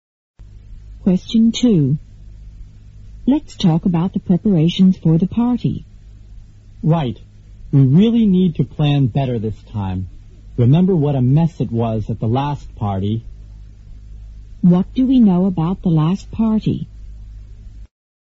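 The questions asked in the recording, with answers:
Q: What do we know about the last party?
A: It was poorly planned and a mess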